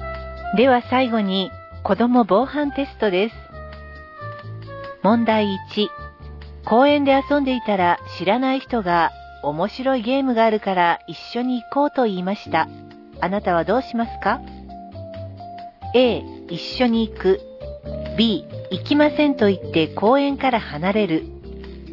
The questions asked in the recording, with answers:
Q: あなたはどうしますか?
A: 正解は B. 知らない人に声をかけられたらすぐにその場を離れます。